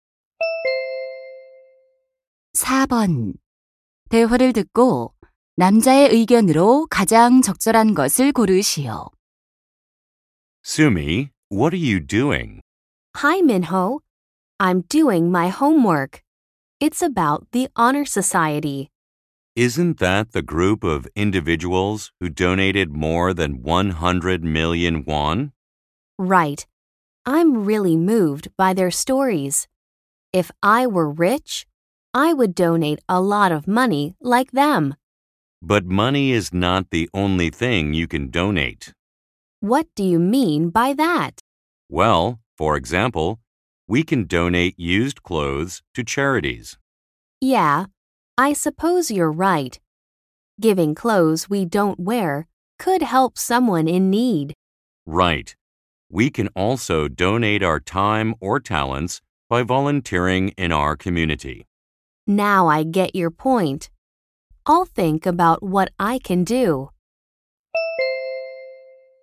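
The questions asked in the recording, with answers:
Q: 대화를 듣고 남자의 의견으로 가장 적절한 것을 고르시오.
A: 돈 외에도 옷, 시간, 재능 등 다양한 것을 기부할 수 있다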